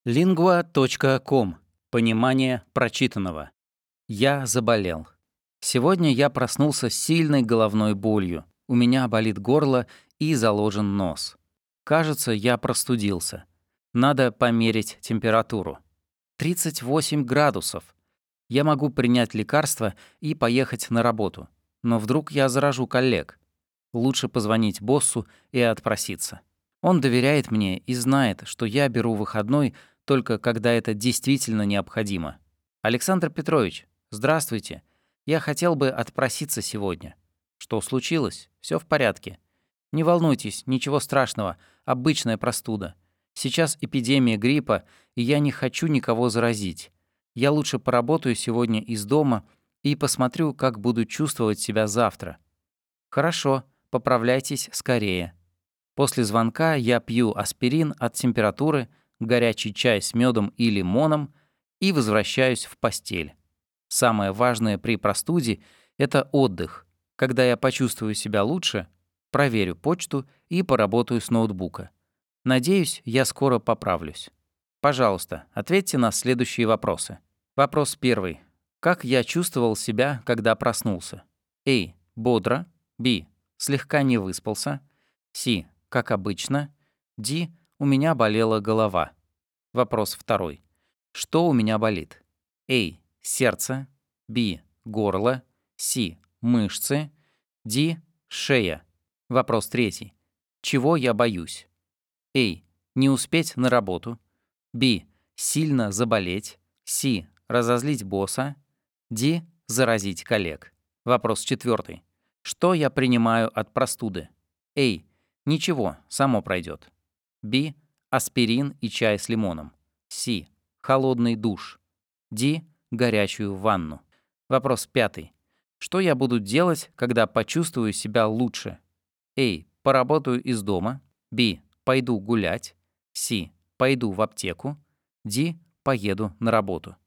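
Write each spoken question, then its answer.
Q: Как я чувствовал себя, когда проснулся?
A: Д: У меня болела голова.

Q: Что у меня болит?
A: Б: Горло.

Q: Чего я боюсь?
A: Д: Заразить коллег.

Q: Что я принимаю от простуды?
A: Б: Аспирин и чай с лимоном.

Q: Что я буду делать, когда почувствую себя лучше?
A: А: Поработаю из дома.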